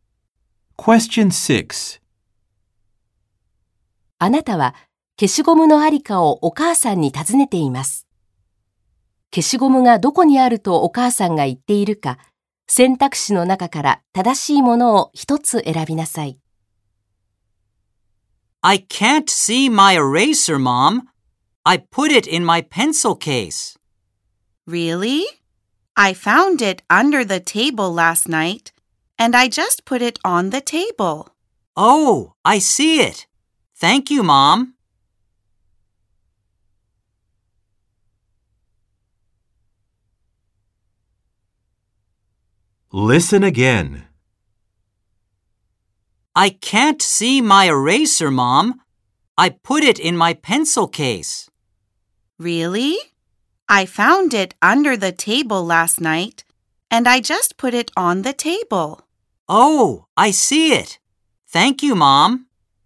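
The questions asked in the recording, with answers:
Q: 消しゴムがどこにあるとお母さんが言っているか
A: テーブルの上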